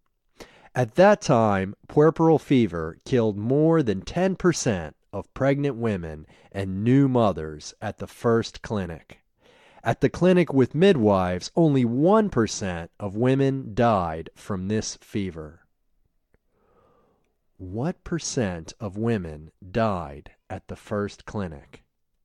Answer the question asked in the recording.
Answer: Ten percent of women died at the first clinic.